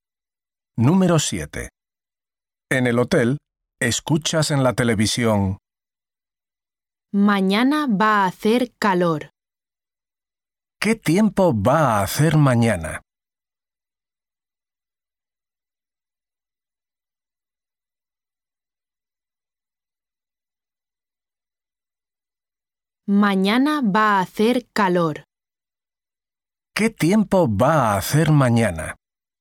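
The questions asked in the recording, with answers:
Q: ¿Qué tiempo va a hacer mañana?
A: Va a hacer calor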